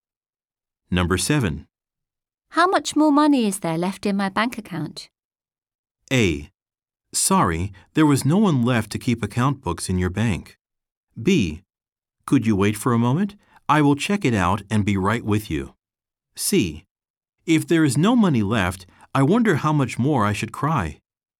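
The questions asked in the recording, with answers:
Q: How much more money is there left in my bank account?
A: B: Could you wait for a moment? I will check it out and be right with you.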